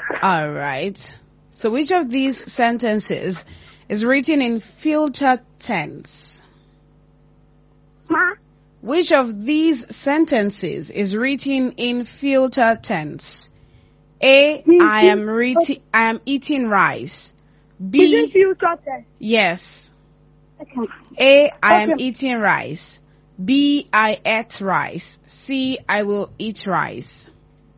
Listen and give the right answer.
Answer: I will eat rice. That is correct.